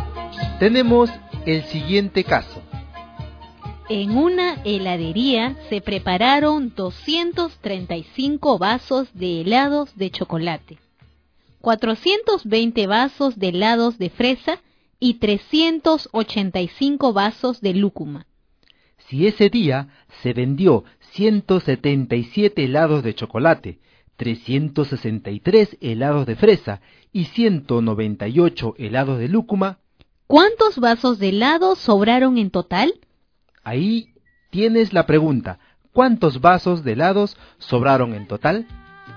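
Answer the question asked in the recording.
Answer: 302 vasos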